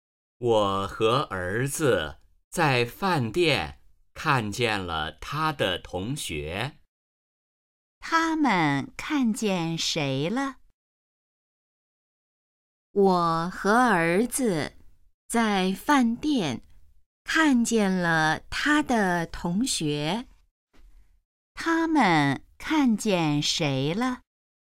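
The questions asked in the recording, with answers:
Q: 他们看见谁了?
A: 儿子的同学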